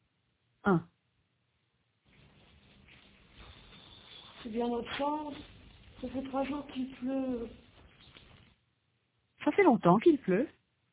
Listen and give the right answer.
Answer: 3 jours. Ça fait 3 jours qu'il pleut.